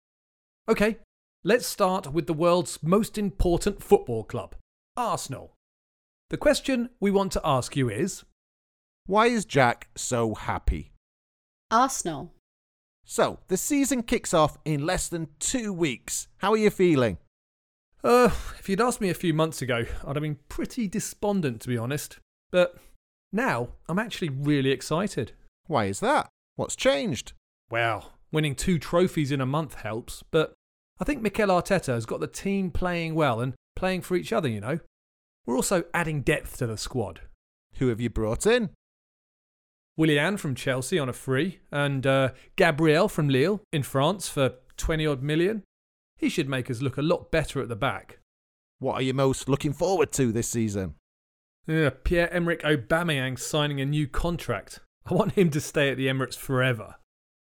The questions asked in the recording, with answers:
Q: why is Jack so happy?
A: Well, I'm happy with our new signings, and I'm very happy how Mikel Arteta is changing the team.